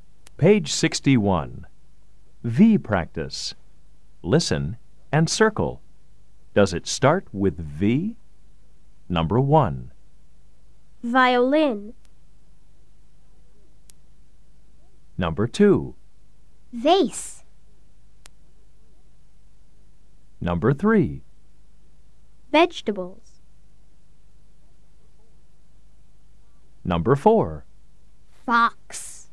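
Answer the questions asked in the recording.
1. Yes (violin)
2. Yes (vase)
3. Yes (vegetables)
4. No (fox)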